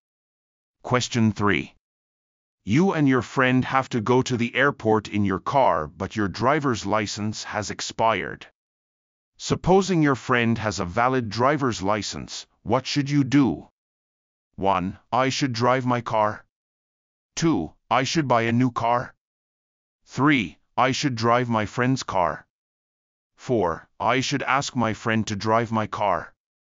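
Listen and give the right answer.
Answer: 4: I should ask my friend to drive my car.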